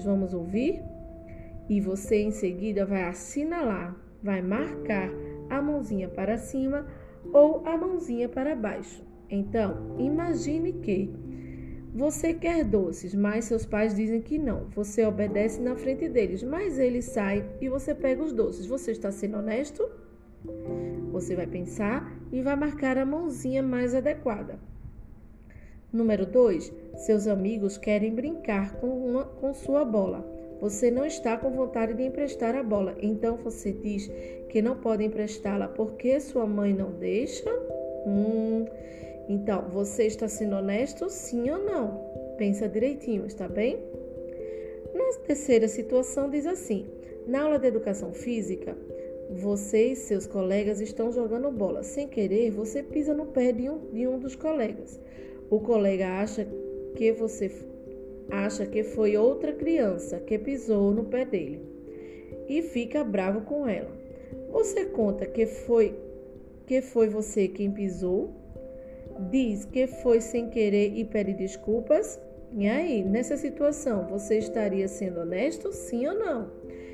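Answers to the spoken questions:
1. Não
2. Não
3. Sim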